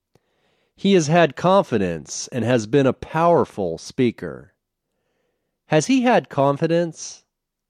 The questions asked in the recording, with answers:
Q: Has he had confidence?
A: Yes, he has had confidence.